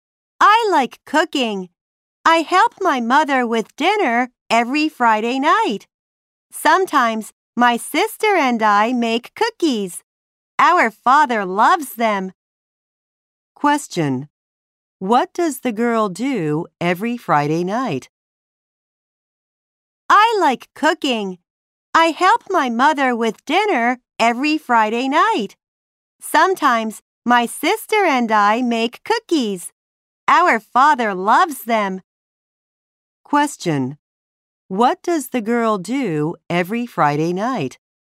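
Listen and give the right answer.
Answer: She helps her mother with dinner.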